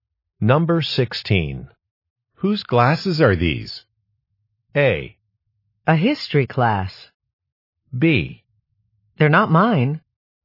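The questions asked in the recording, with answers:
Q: Whose glasses are these?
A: B: They're not mine.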